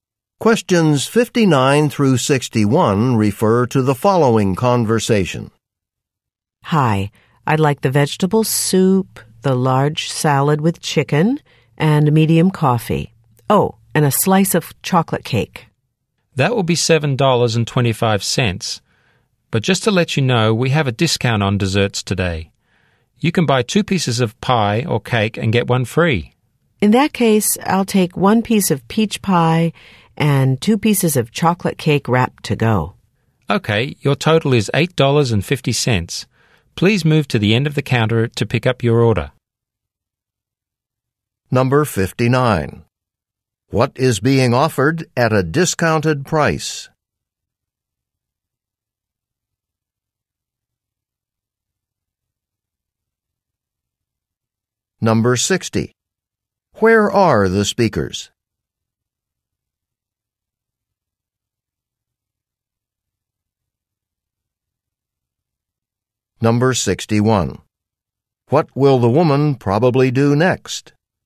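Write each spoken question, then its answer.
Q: What is being offered at a discounted price?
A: Desserts

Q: Where are the speakers?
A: In a restaurant or café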